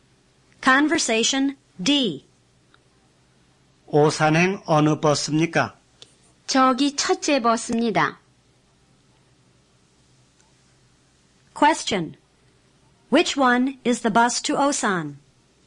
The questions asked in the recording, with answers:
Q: Which one is the bus to Osan?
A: It's the first one over there.